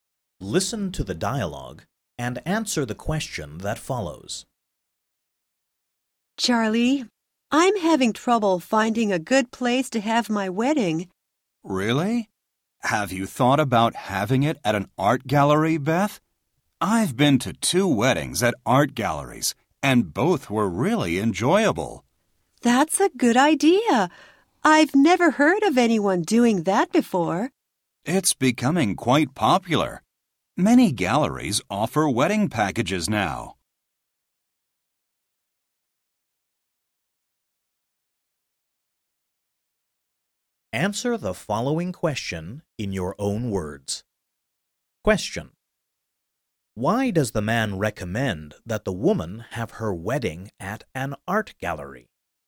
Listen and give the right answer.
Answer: Because he has been to two weddings at art galleries,